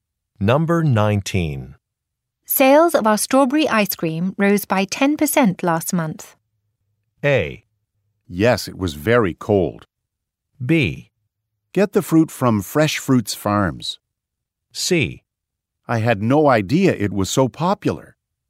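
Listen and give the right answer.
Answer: C: I had no idea it was so popular.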